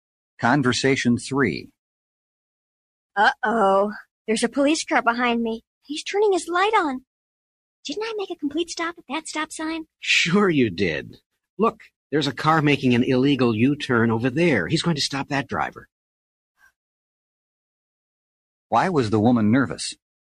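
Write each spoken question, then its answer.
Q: Why was the woman nervous?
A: She thought the police were stopping her for not stopping at the stop sign.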